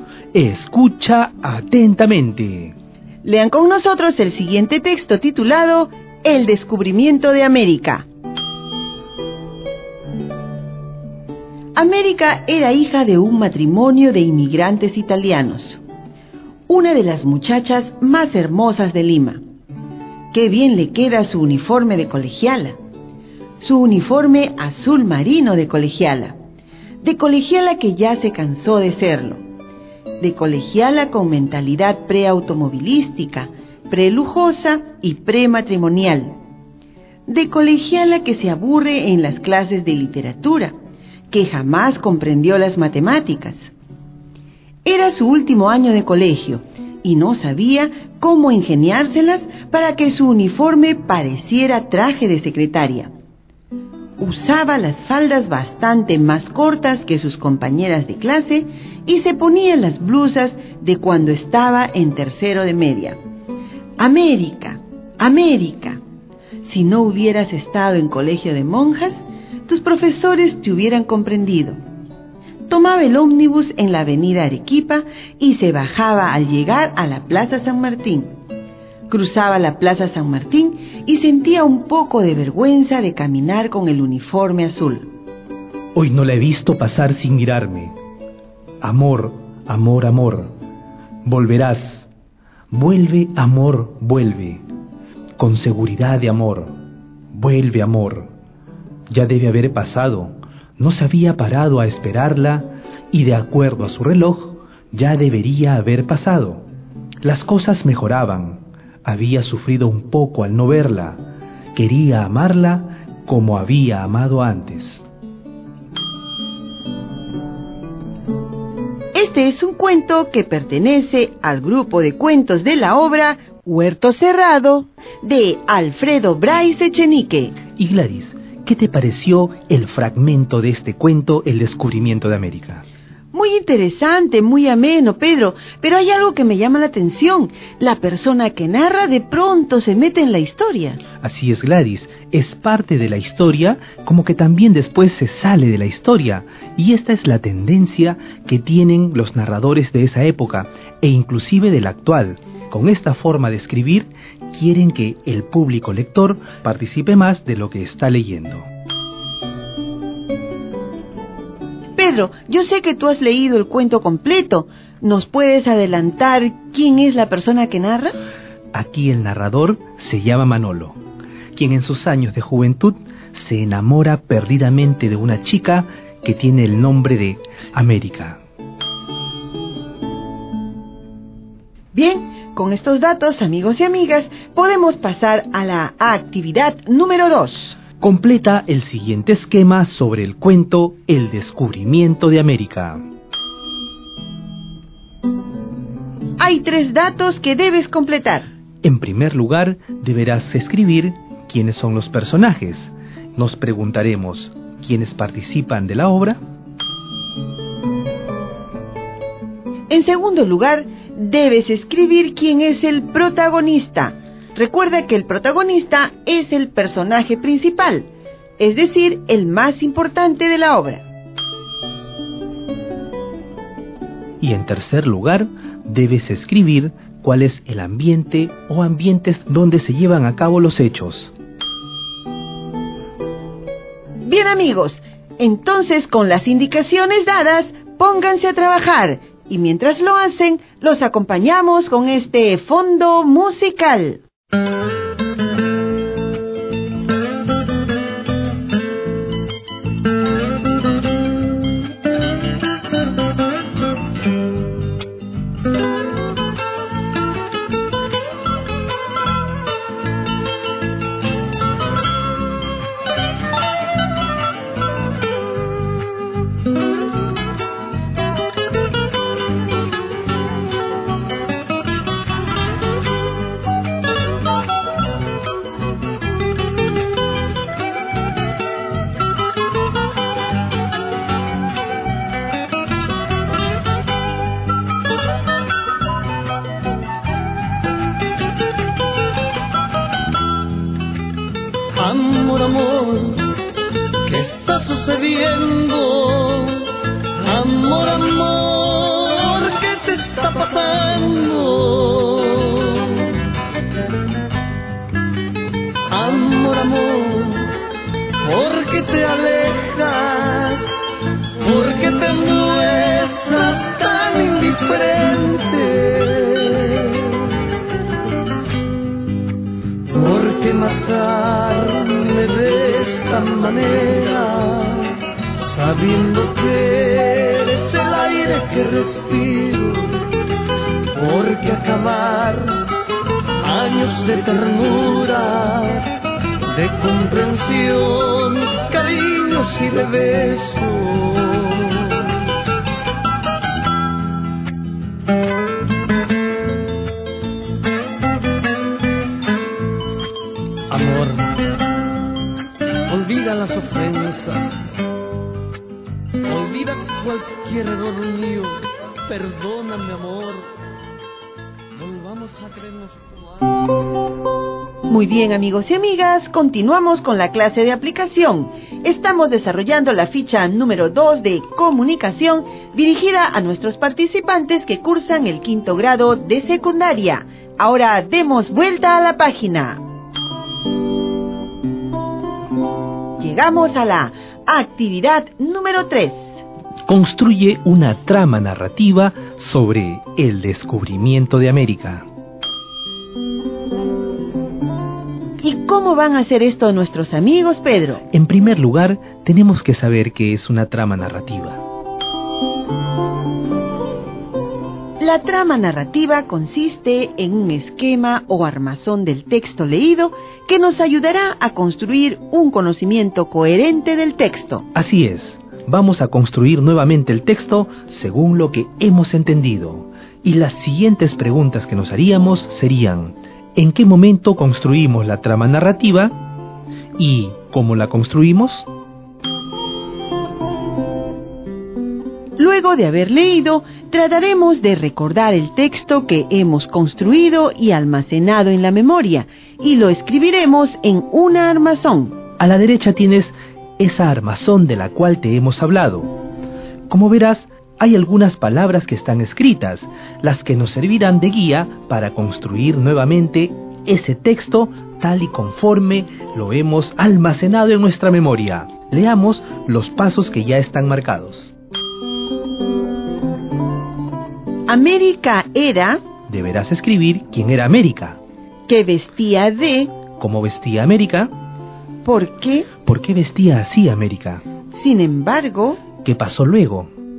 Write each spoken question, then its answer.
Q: ¿Cómo vestía América?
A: uniforme azul marino.

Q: ¿Por qué vestía así América?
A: Era colegiala del último año de secundaria.